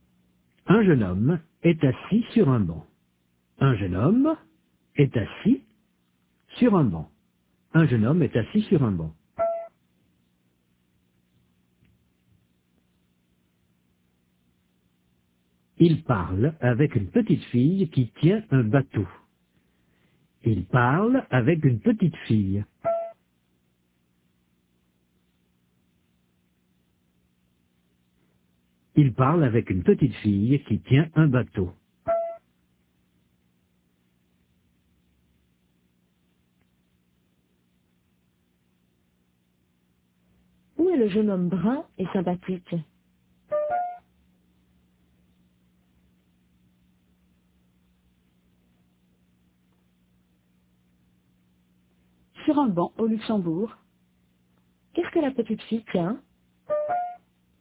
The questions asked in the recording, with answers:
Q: Qu'est-ce que la petite fille tient?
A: Un bateau.